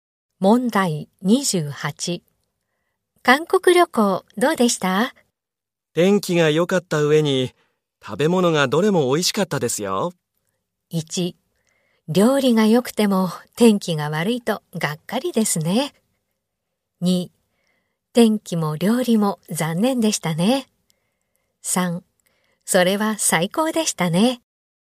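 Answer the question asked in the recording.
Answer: 3: それは最高でしたね。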